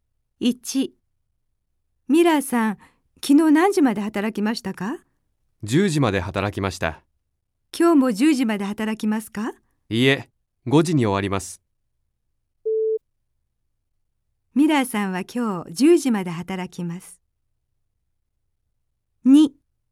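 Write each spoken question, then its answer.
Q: ミラーさんは今日10時まで働きます。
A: ×(今日は5時に終わります)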